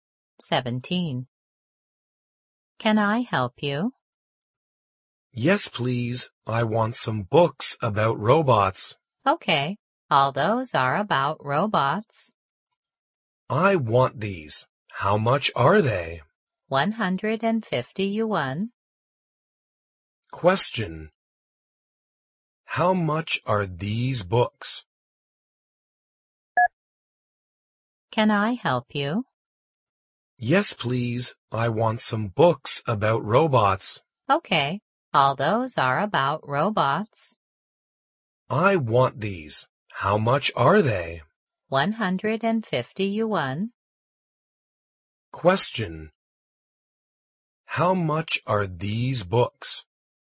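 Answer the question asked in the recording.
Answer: 150 yuan.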